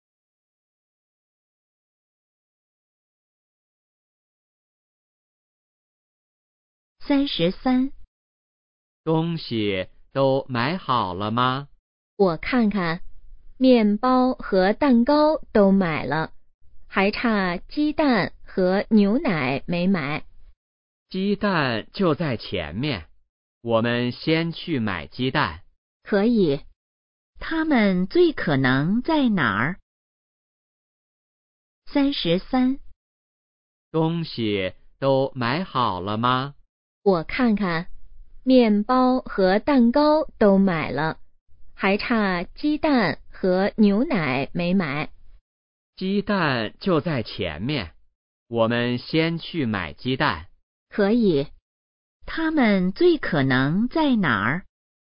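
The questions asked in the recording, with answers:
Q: 他们最可能在哪儿?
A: 超市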